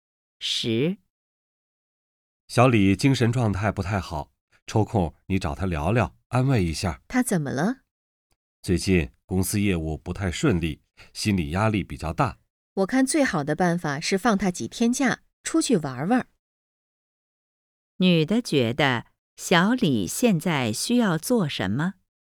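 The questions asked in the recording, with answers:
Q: 女的觉得小李现在需要做什么?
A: 放几天假,出去玩玩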